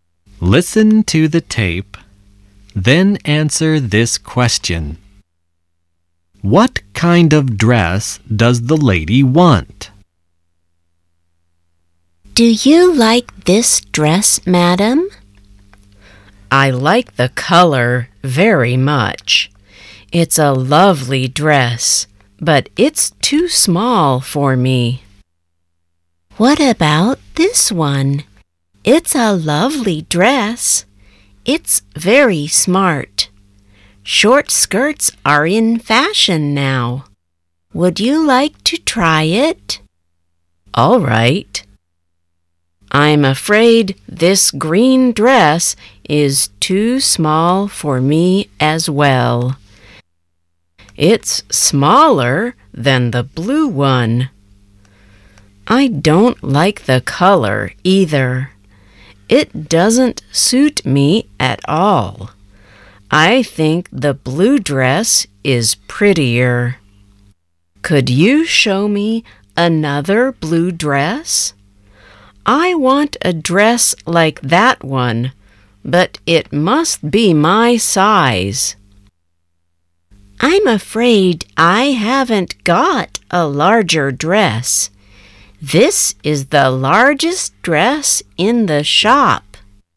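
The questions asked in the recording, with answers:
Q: What kind of dress does the lady want?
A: A blue dress like the first one, but in her size (a larger one)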